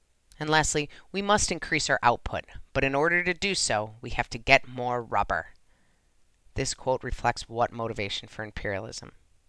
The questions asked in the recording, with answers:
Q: This quote reflects what motivation for imperialism.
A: The last one industrialization.